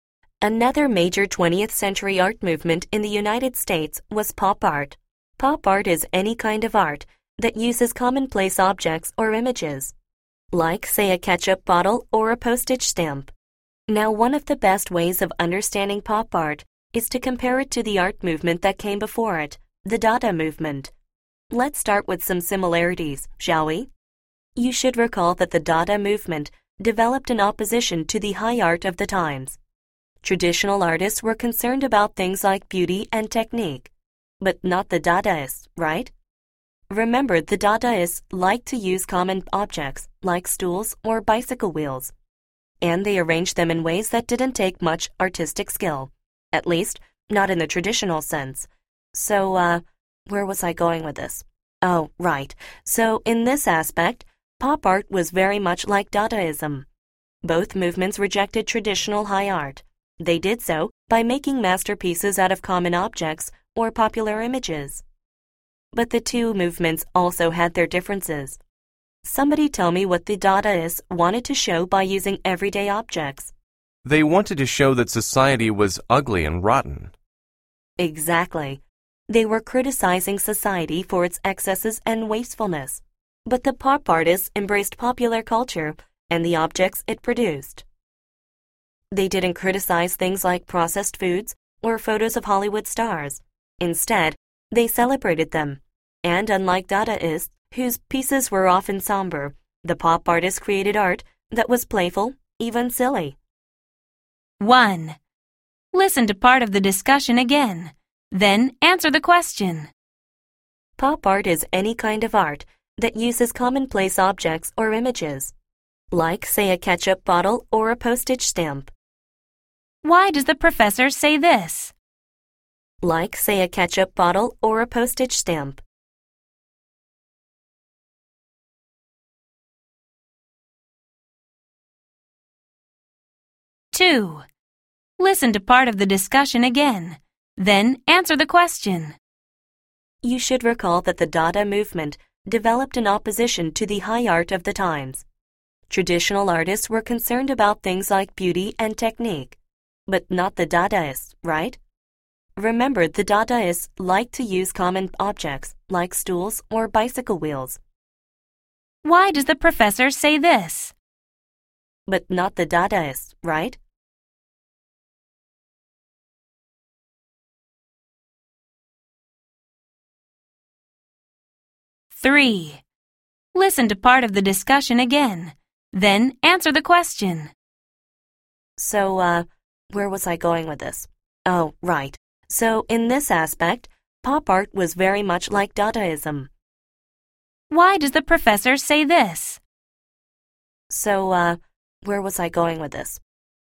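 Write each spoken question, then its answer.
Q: Why does the professor say this?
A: To give examples of the commonplace objects that pop art uses

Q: Why does the professor say this?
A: To get back to the point after a digression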